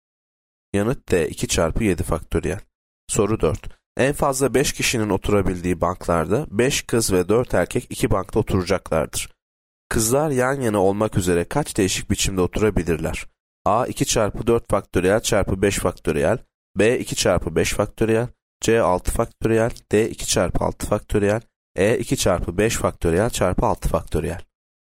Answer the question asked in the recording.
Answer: Yanıt A 2 çarpı 4 faktöriyel çarpı 5 faktöriyel.